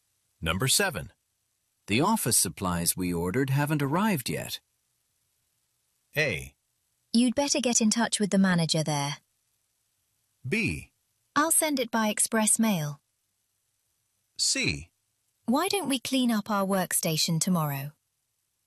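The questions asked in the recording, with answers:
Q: The office supplies we ordered haven't arrived yet.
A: A: You'd better get in touch with the manager there.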